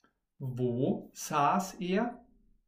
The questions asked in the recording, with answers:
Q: Wo saß er?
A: auf einer Bank in der Stadt.